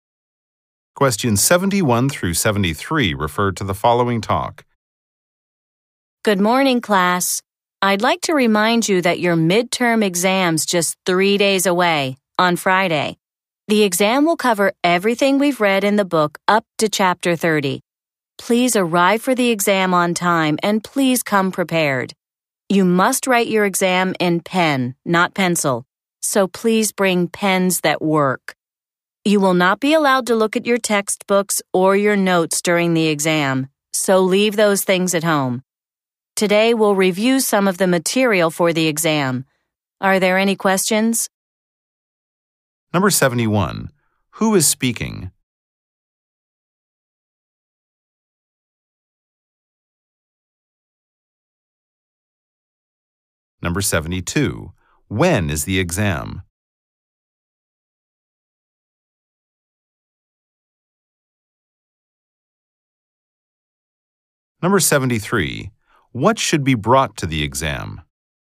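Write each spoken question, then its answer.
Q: Who is speaking?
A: A teacher.

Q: When is the exam?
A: On Friday.

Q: What should be brought to the exam?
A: Pens.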